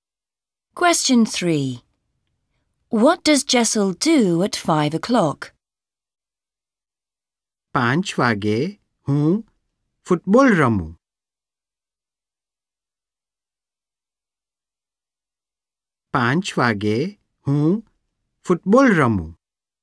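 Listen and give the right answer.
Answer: Plays football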